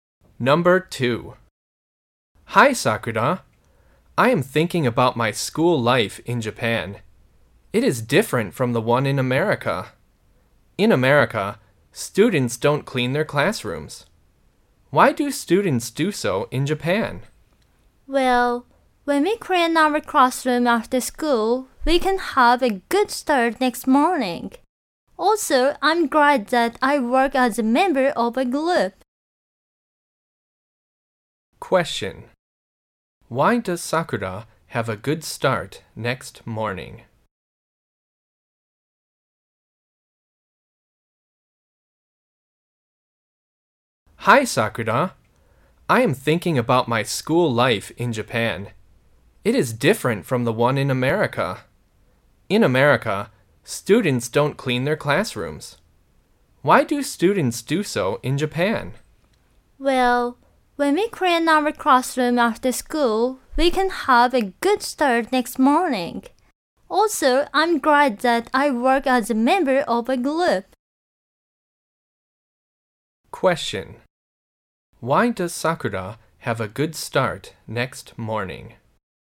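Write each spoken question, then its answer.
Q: Why does Sakura have a good start next morning?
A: Because they clean their classroom after school.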